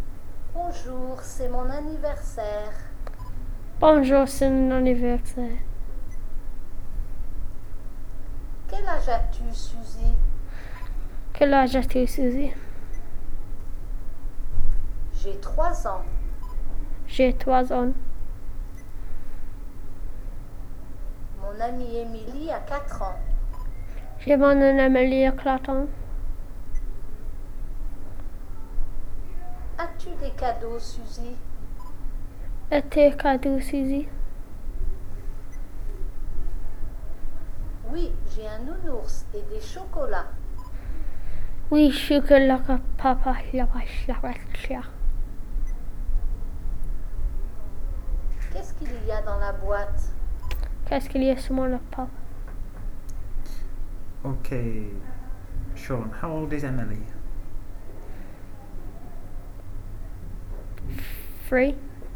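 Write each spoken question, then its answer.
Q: Ok, Sean, how old is Emily?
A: Four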